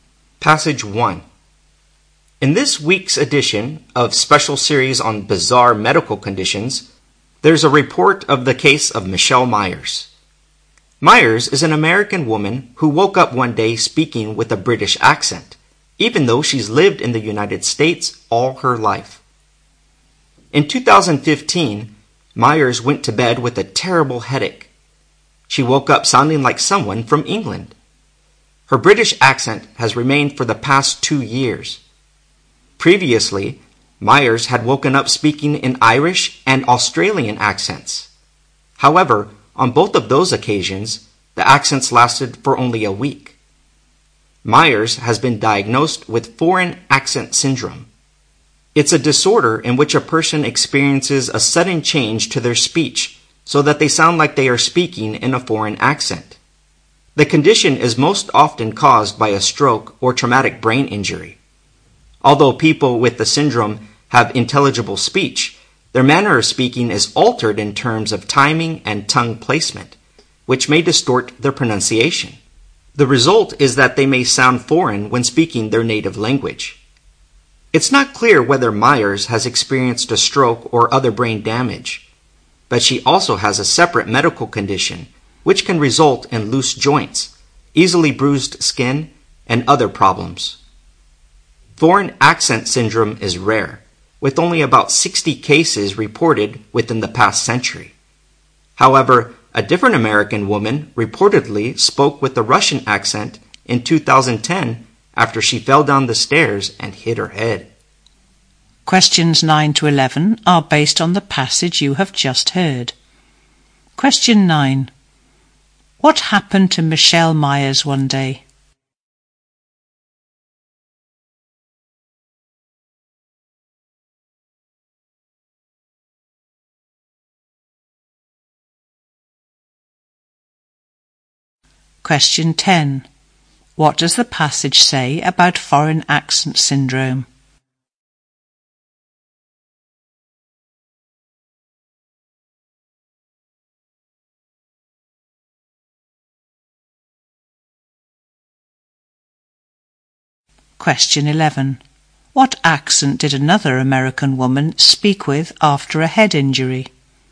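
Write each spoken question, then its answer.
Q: What happened to Michelle Myers one day?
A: She woke up speaking with a British accent

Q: What does the passage say about foreign accent syndrome?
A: It is rare, with about 60 cases in the past century

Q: What accent did another American woman speak with after a head injury?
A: A Russian accent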